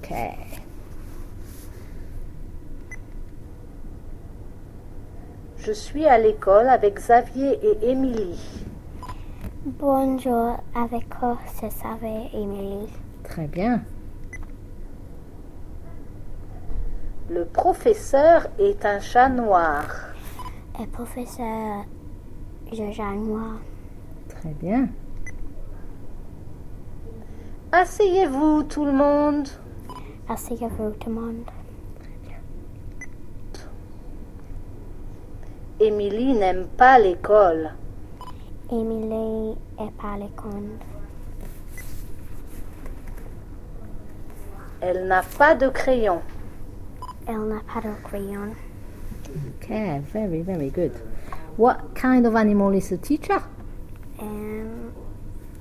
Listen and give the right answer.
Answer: No, un chat noir.